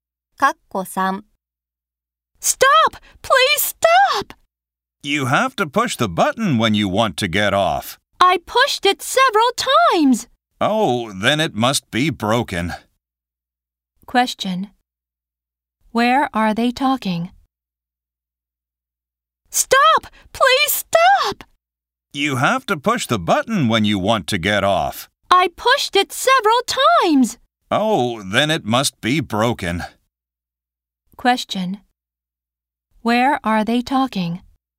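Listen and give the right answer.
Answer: On a bus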